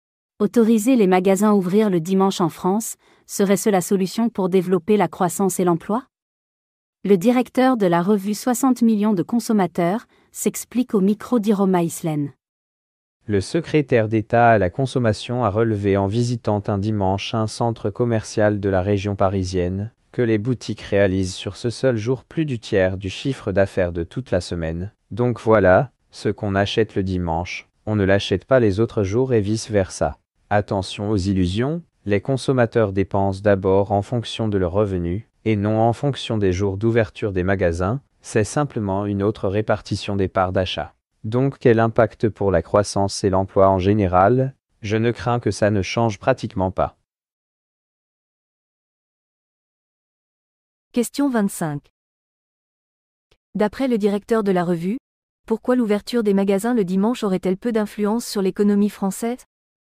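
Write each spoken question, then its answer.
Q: D'après le directeur de la revue, pourquoi l'ouverture des magasins le dimanche aurait-elle peu d'influence sur l'économie française?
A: Parce que les consommateurs dépensent selon leurs revenus : ce qu'on achète le dimanche, on ne l'achète pas les autres jours, les achats sont seulement répartis autrement.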